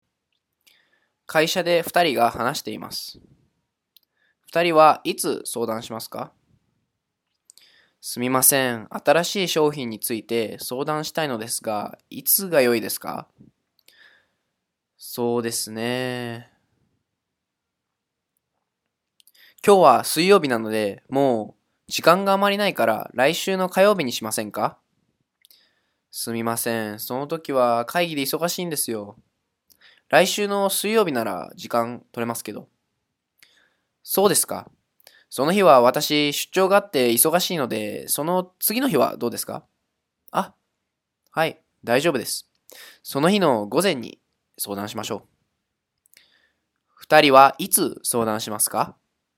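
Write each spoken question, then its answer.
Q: 二人はいつ相談しますか?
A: 来週の木曜日の午前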